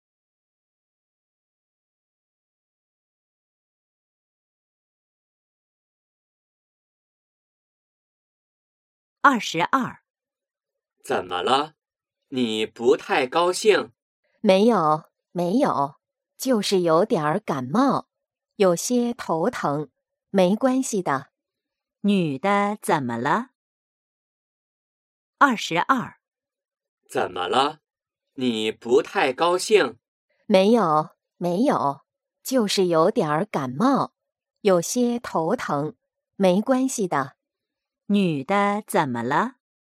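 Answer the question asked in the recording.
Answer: 有点感冒,头疼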